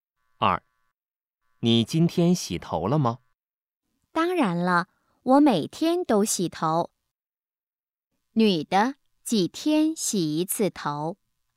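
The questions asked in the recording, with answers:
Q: 女的,几天洗一次头?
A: 每天洗一次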